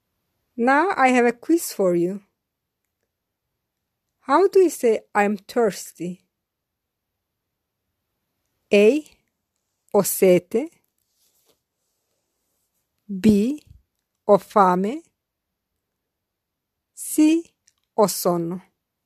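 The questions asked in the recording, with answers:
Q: How do you say I'm thirsty?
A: A: Ho sete.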